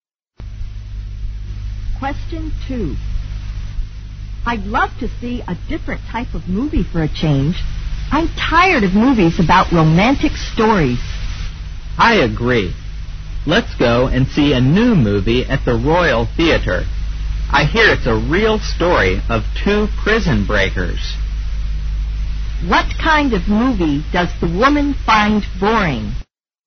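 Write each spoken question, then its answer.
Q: What kind of movie does the woman find boring?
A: Romantic movies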